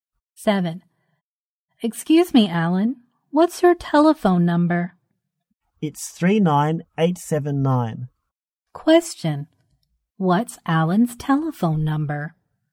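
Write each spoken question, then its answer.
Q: Question, what's Alan's telephone number?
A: 39879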